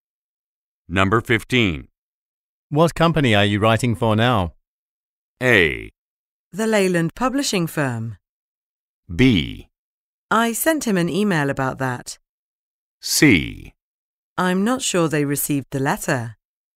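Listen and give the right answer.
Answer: A: The Leyland Publishing Firm.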